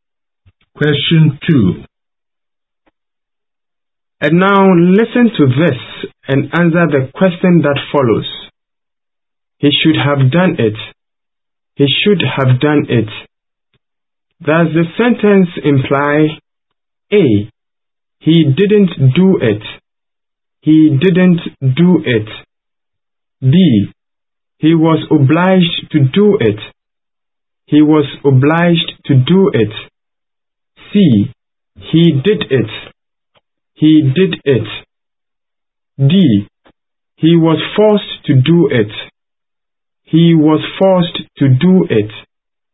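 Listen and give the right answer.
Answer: A: He didn't do it.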